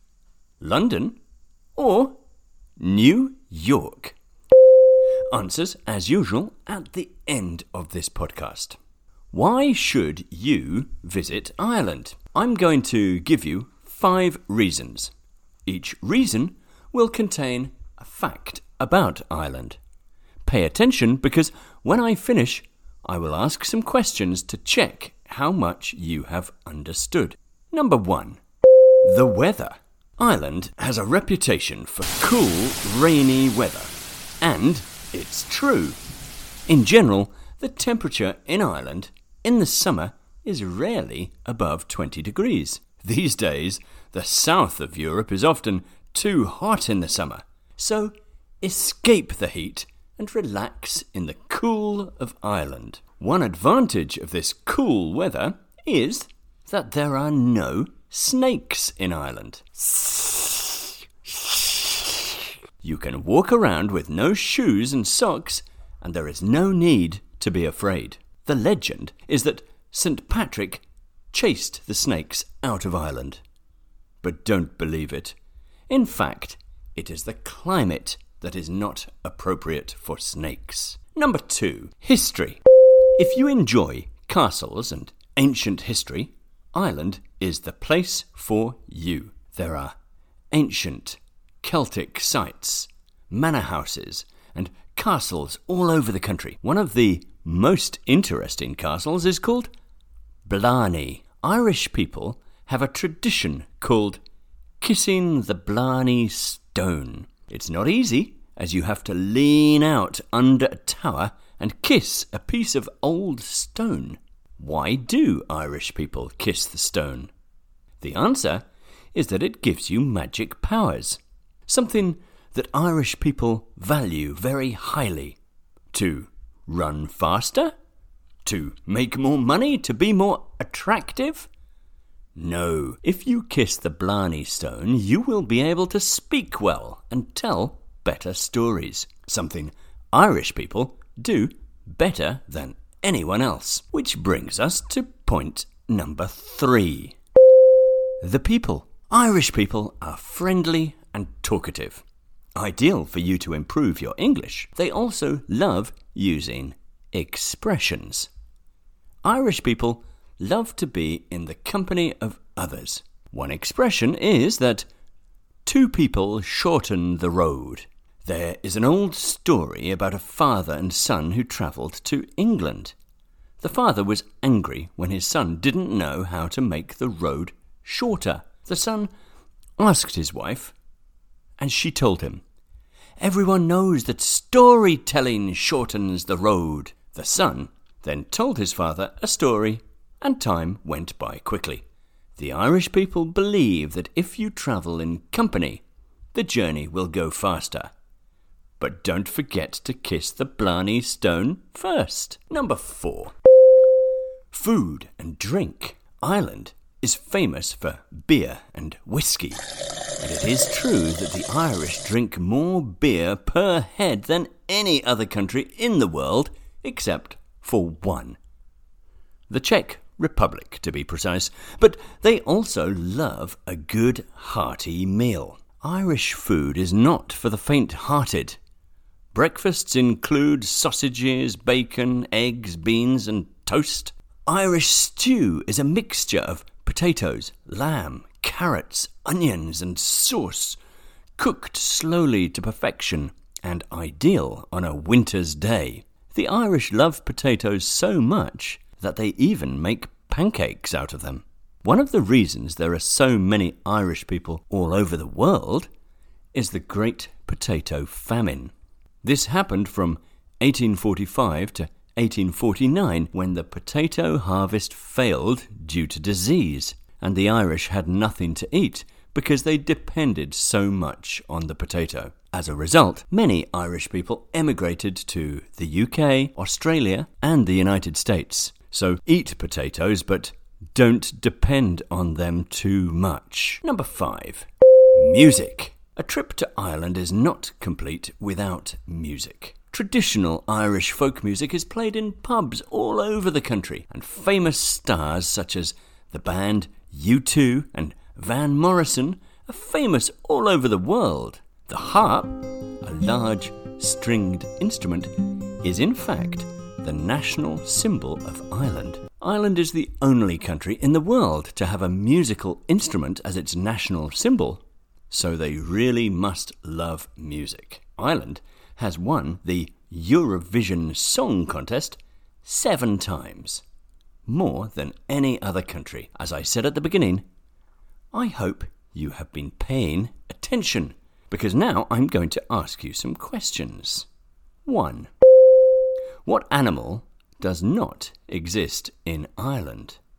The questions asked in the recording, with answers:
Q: What animal does not exist in Ireland?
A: the correct answer is snake.